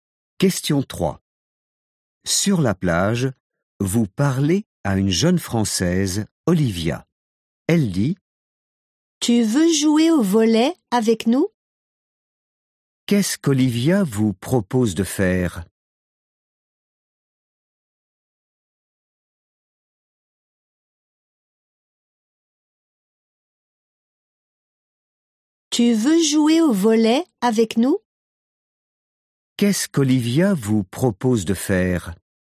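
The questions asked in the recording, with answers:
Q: Qu'est-ce qu'Olivia vous propose de faire ?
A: Jouer au volley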